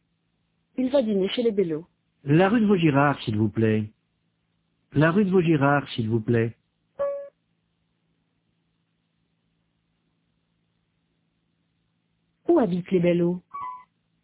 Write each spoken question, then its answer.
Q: Où habitent les Bellot?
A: Rue de Vaugirard.